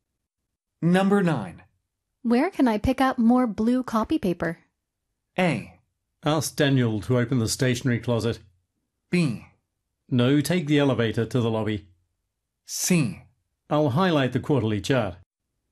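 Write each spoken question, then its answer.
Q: Where can I pick up more blue copy paper?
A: A: Ask Daniel to open the stationery closet.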